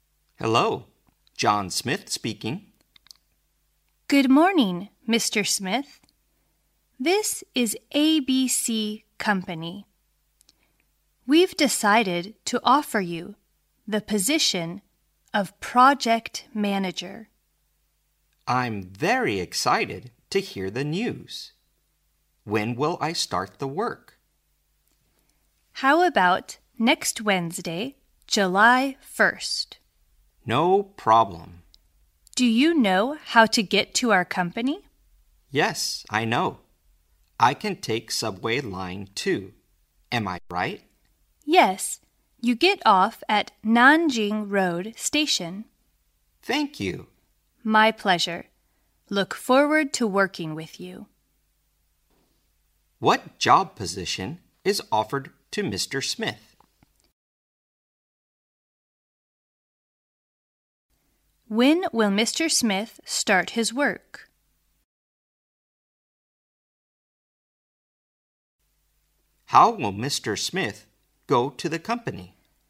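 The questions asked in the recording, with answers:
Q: What job position is offered to Mr. Smith?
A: Project manager

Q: When will Mr. Smith start his work?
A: Next Wednesday, July 1st

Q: How will Mr. Smith go to the company?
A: By subway line 2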